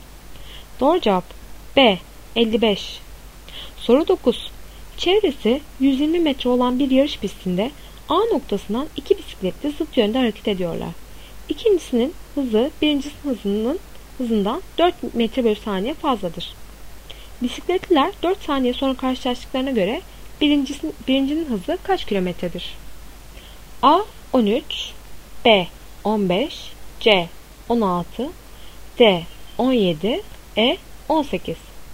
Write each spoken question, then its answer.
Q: Bisikletliler 4 saniye sonra karşılaştıklarına göre birincinin hızı kaç kilometredir?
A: Doğru cevap A 13.